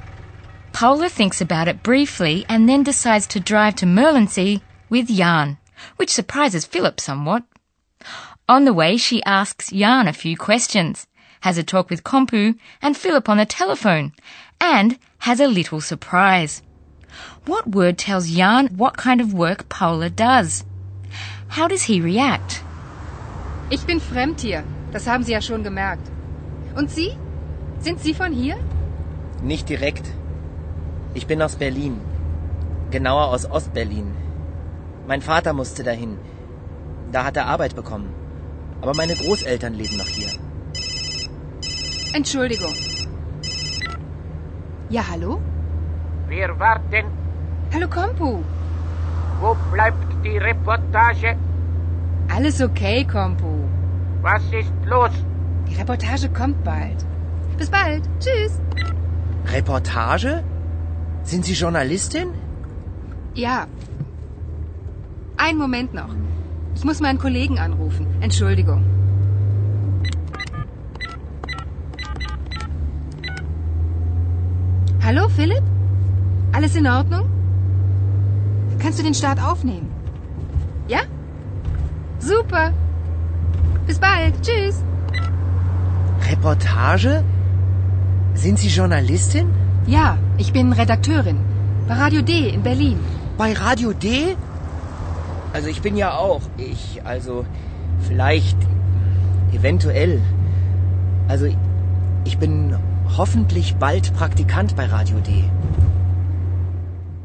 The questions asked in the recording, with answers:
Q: What word tells Jan what kind of work Paula does?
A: And the word reportage told Jan immediately that Paula is a journalist.

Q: How does he react?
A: Well, I'm not surprised in the least that Jan starts stuttering like that.